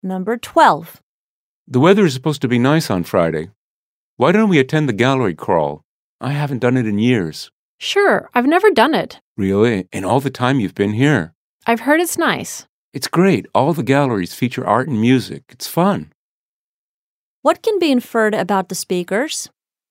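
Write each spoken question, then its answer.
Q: What can be inferred about the speakers?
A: One speaker has done the gallery crawl before, but the other has never done it.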